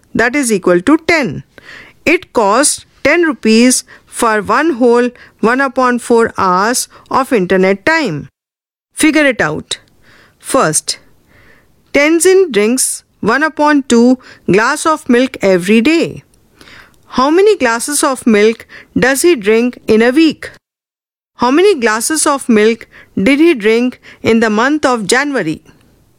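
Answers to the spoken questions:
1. 7/2 glasses (3 1/2)
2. 31/2 glasses (15 1/2)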